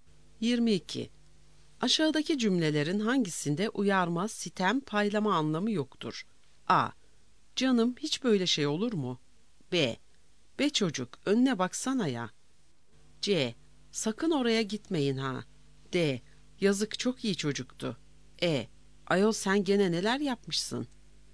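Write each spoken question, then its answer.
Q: Aşağıdaki cümlelerin hangisinde uyarma, sitem, paylama anlamı yoktur?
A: D: Yazık, çok iyi çocuktu.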